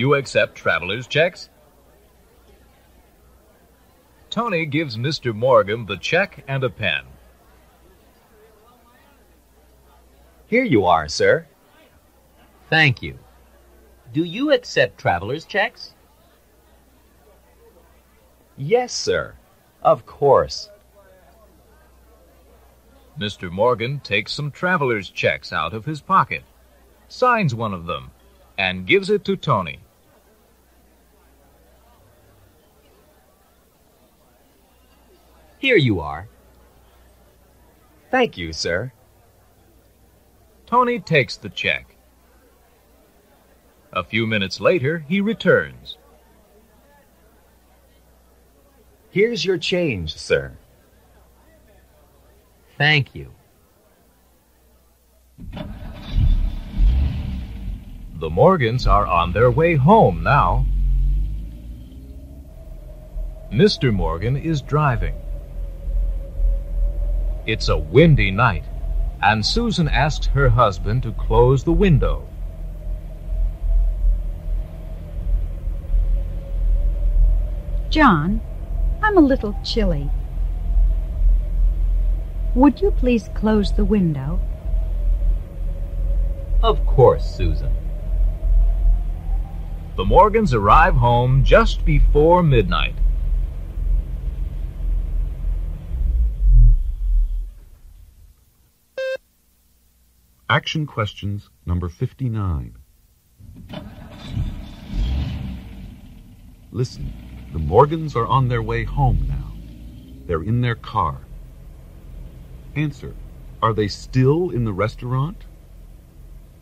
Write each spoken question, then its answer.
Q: are they still in the restaurant?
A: No, they're not.